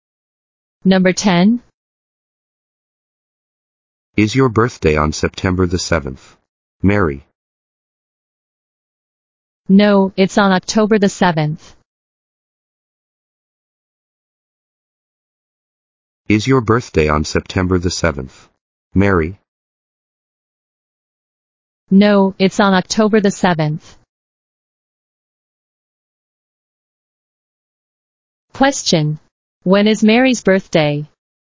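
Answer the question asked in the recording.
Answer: On October the 7th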